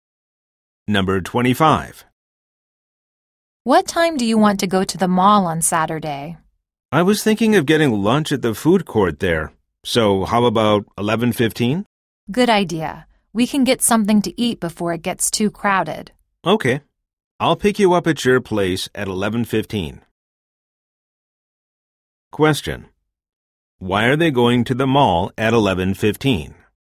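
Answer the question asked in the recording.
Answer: To eat lunch at the food court before it gets too crowded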